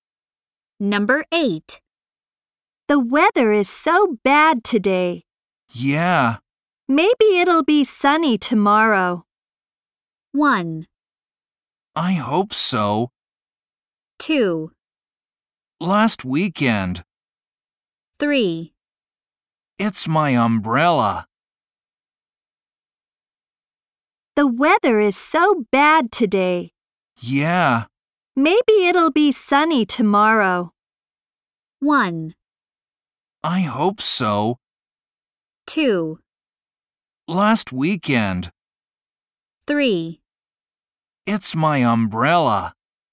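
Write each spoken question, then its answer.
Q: Maybe it'll be sunny tomorrow.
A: 1: I hope so.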